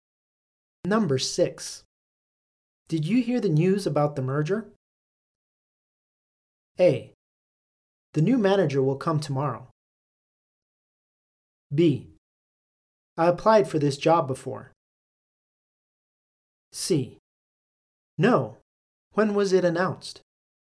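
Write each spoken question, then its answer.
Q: Did you hear the news about the merger?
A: C: No. When was it announced?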